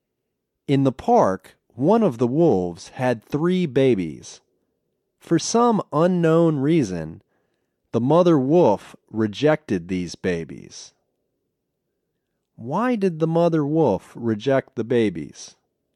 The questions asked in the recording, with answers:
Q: Why did the mother wolf reject the babies?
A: No one knows. The reason is unknown.